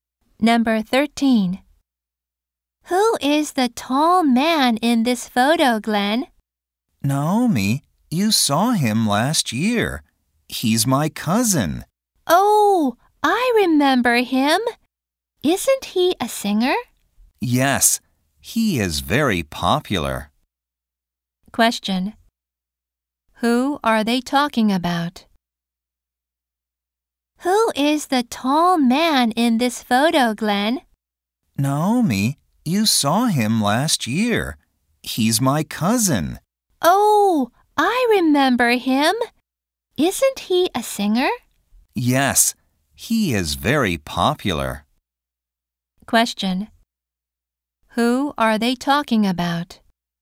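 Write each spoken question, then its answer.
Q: Who are they talking about?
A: Glenn's cousin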